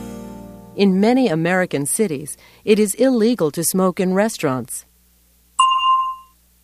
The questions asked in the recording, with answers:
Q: In many American cities, it is illegal to smoke in restaurants.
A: True. Smoking in restaurants is against the law in many American cities.